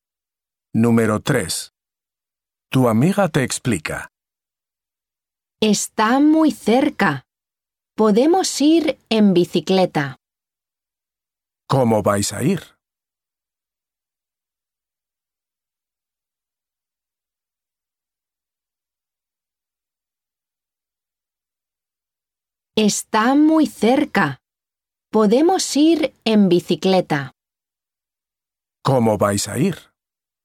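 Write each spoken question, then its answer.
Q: ¿Cómo vais a ir?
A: En bicicleta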